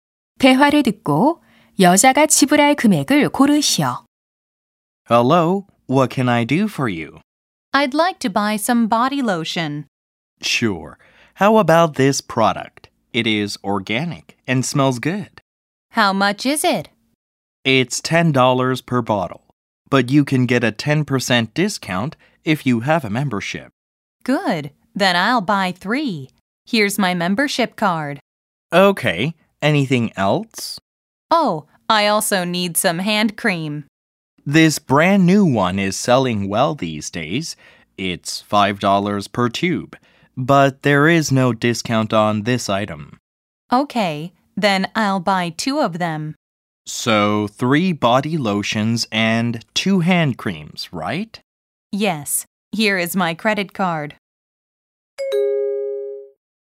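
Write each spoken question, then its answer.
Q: 대화를 듣고 여자가 지불할 금액을 고르시오.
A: 37달러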